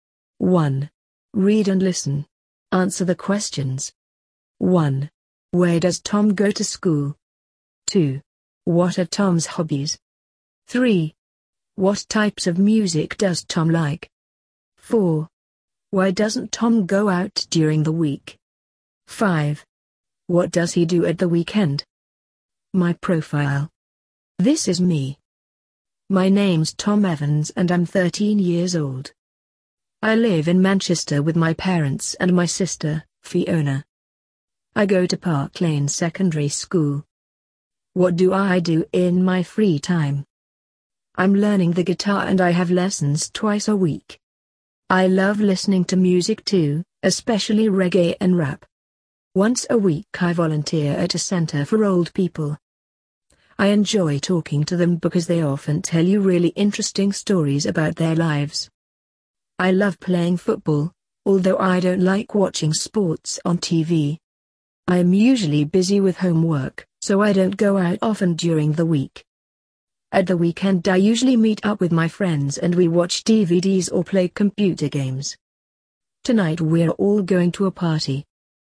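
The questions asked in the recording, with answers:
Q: Where does Tom go to school?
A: Park Lane Secondary School

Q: What are Tom's hobbies?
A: Playing the guitar, listening to music, volunteering at a center for old people and playing football

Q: What types of music does Tom like?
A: Reggae and rap

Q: Why doesn't Tom go out during the week?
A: He's usually busy with homework

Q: What does he do at the weekend?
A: He meets up with his friends and they watch DVDs or play computer games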